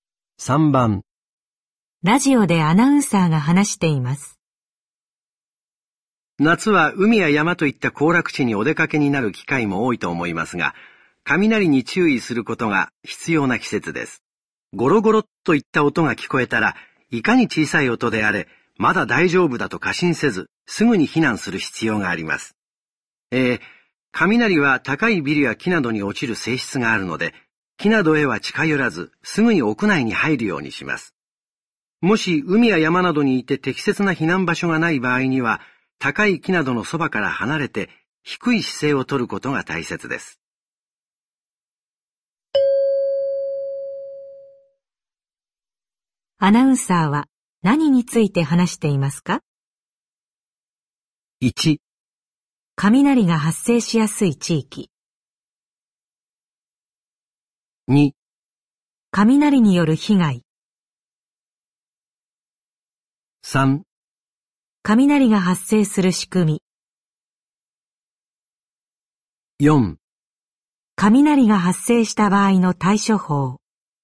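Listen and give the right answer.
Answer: 4: 雷が発生した場合の対処法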